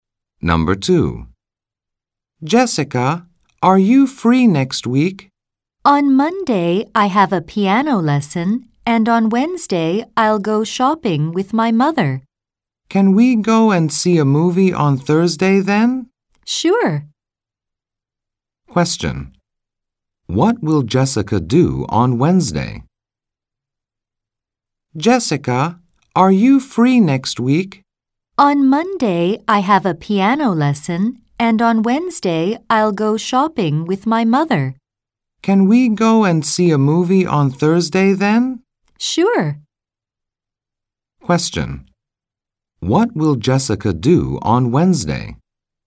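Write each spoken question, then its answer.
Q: What will Jessica do on Wednesday?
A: Go shopping with her mother.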